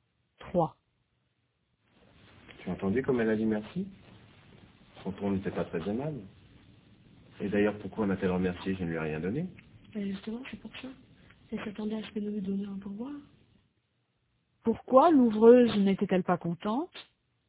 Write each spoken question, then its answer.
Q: Pourquoi l'ouvreuse n'était-elle pas contente?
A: Parce qu'elle s'attendait à ce qu'il lui donne un pourboire.